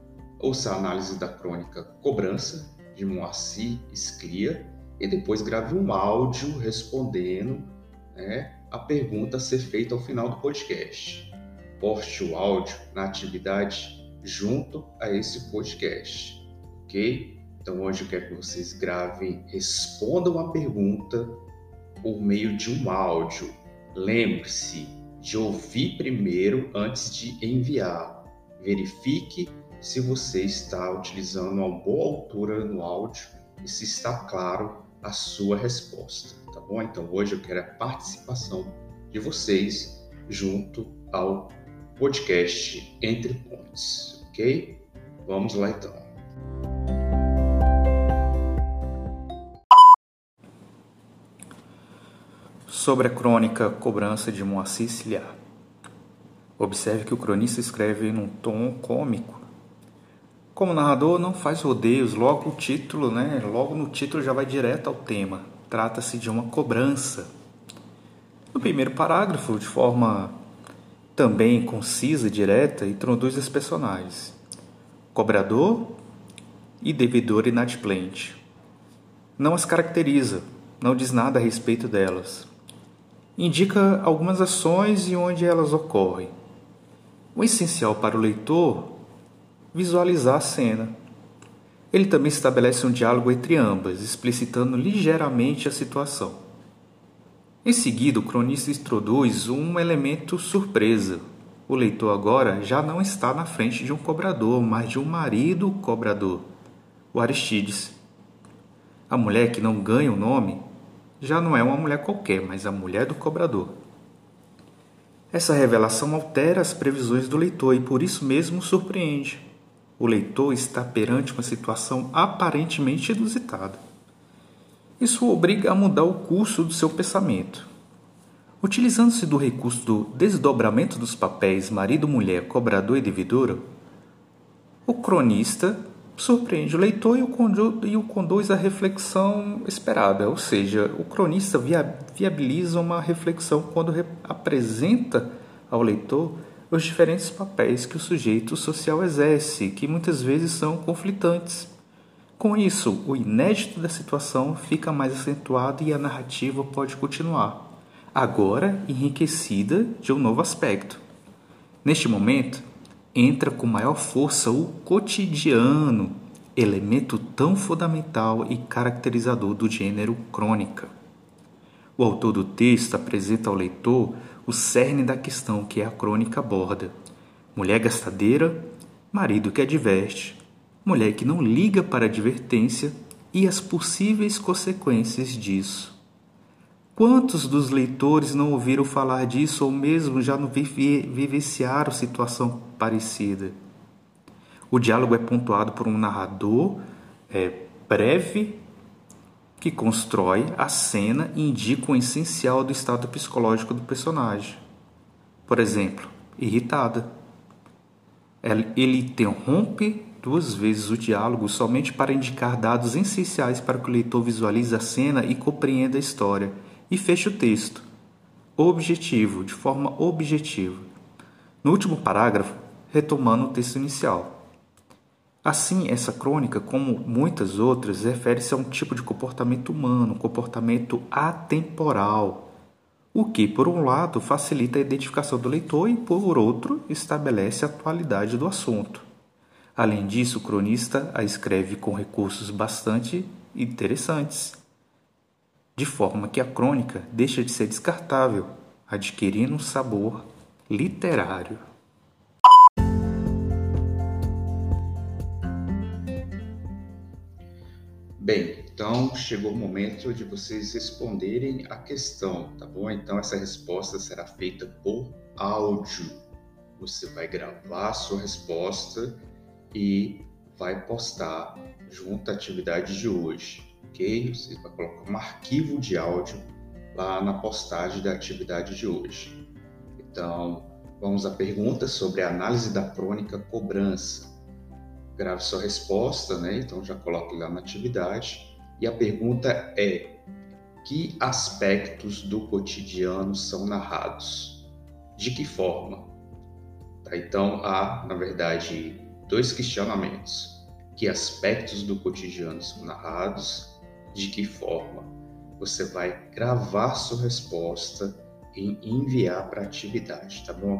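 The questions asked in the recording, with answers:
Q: que aspectos do cotidiano são narrados?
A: Uma mulher que gasta demais, o marido que a adverte e a mulher que ignora a advertência e suas consequências; o marido é o cobrador e a mulher a devedora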